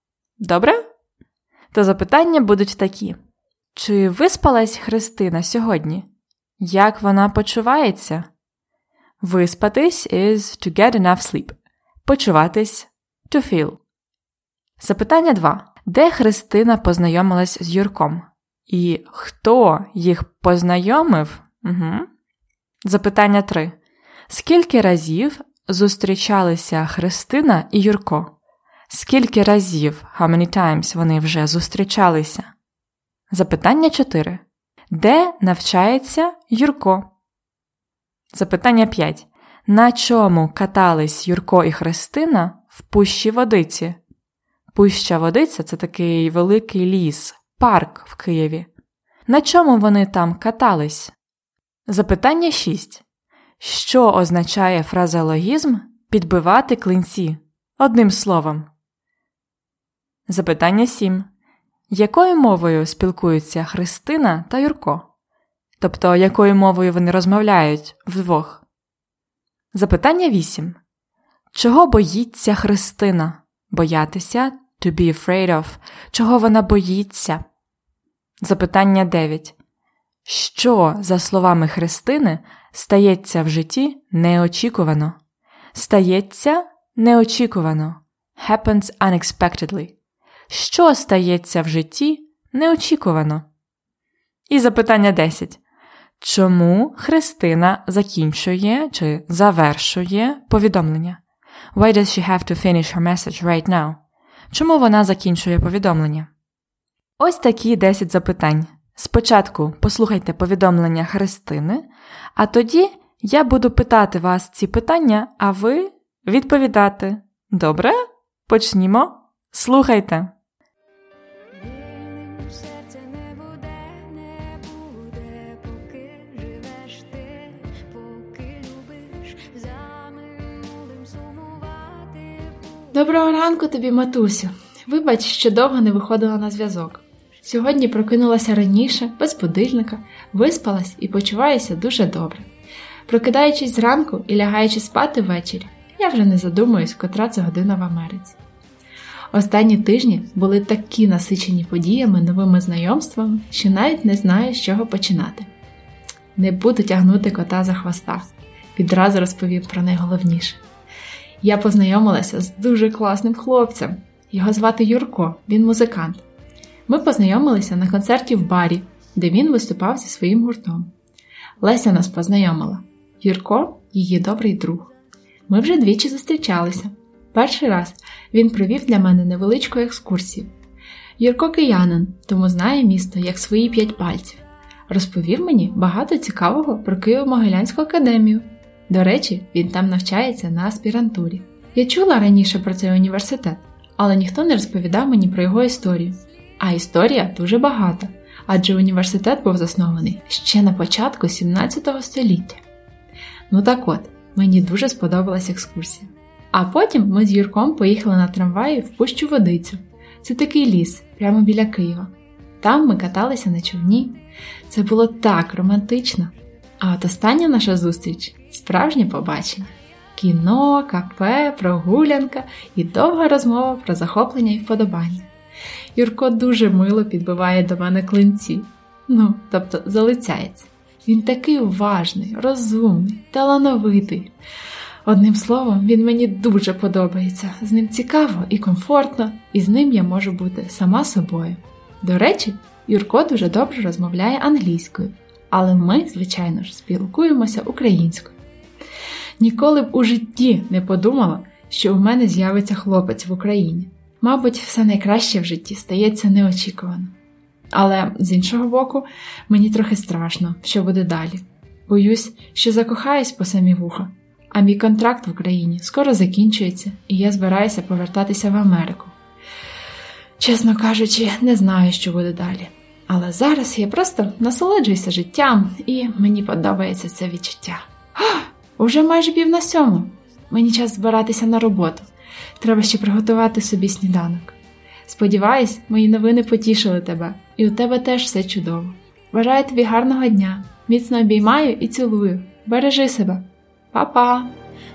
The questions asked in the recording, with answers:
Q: Чи виспалась Христина сьогодні? Як вона почувається?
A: Так, вона виспалась і почувається добре.

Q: Де Христина познайомилась з Юрком? І хто їх познайомив?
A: То вона познайомилась з Юрком на концерті в барі. Їх познайомила Леся.

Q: Скільки разів зустрічалися Христина і Юрко?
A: То скільки разів вони зустрічалися двічі або два рази.

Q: Де навчається Юрко?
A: Він навчається у Києво-Могилянській академії на аспірантурі.

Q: На чому катались Юрко і Христина в пущі водиці?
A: Вони каталися на човні човен, rowing boat.

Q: Що означає фразеологізм підбивати клинці?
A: Підбивати клинці означає залицятися по-іншому можна ще сказати, фліртувати.

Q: Якою мовою спілкуються Христина та Юрко?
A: Вони спілкуються українською мовою.

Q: Чого боїться Христина?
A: Христина боїться, що закохається по самі вуха, а її контракт скоро закінчується, і вона збирається повертатися в Америку.

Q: Що, за словами Христини, стається в житті неочікувано?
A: Отже, за словами Христини, все найкраще в житті стається неочікувано.

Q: Чому Христина закінчує чи завершує повідомлення?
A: Бо їй треба збиратися на роботу.